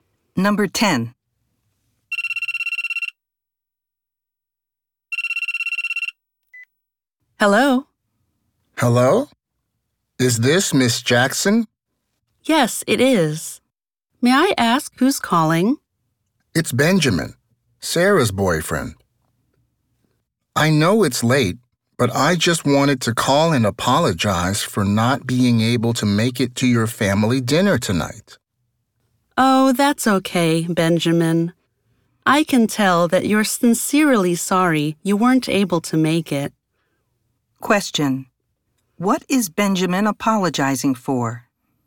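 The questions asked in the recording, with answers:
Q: What is Benjamin apologizing for?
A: Missing the family dinner tonight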